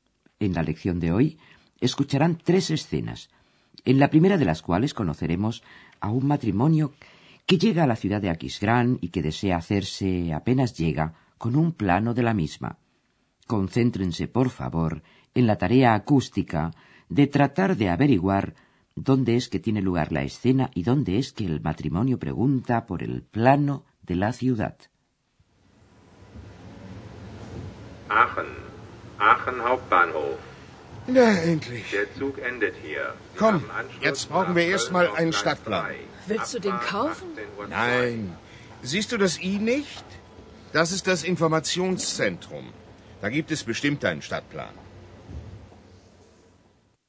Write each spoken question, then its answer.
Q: Concéntrense, por favor, en la tarea acústica de tratar de averiguar dónde es que tiene lugar la escena y dónde es que el matrimonio pregunta por el plano de la ciudad.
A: la escena se desarrolla en la estación de tren de Aquisgrán.